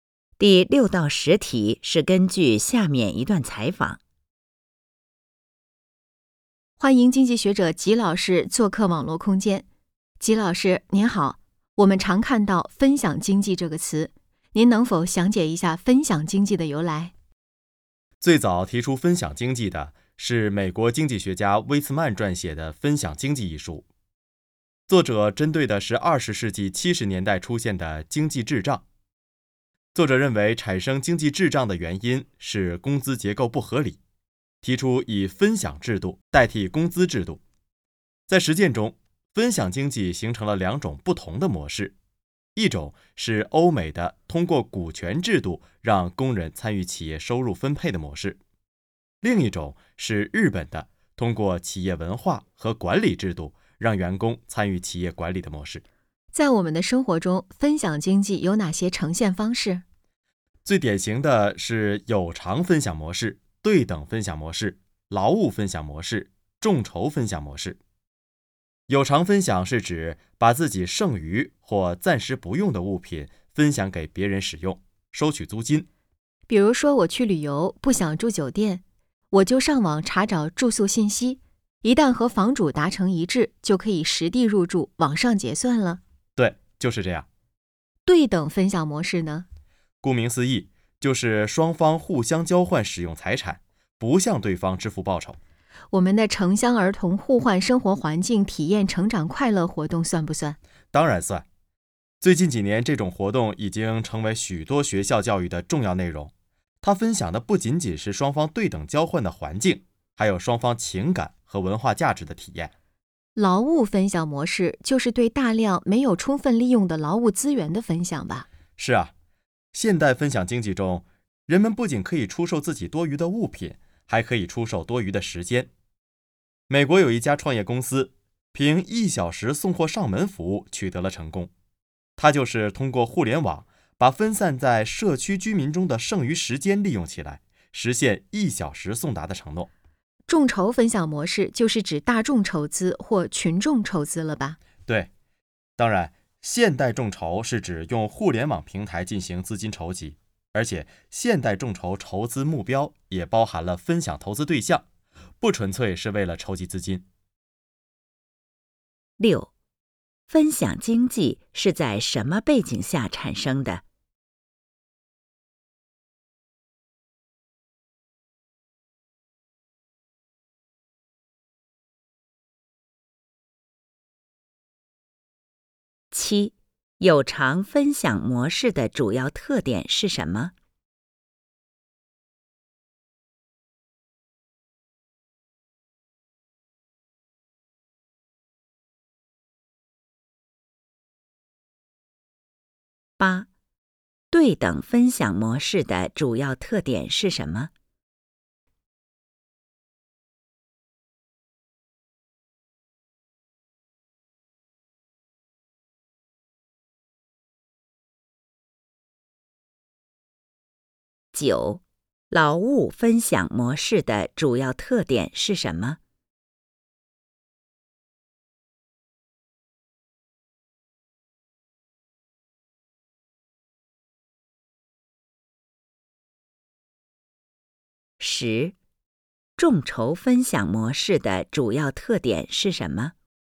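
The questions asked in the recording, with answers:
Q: 分享经济是在什么背景下产生的?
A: 20世纪70年代出现经济滞胀的背景下

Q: 有偿分享模式的主要特点是什么?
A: 把剩余或暂时不用的物品分享给别人使用,收取租金

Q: 对等分享模式的主要特点是什么?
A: 双方互相交换使用财产,不向对方支付报酬

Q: 劳务分享模式的主要特点是什么?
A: 分享(出售)没有充分利用的劳务资源和多余的时间

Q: 众筹分享模式的主要特点是什么?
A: 用互联网平台筹集资金,也分享投资对象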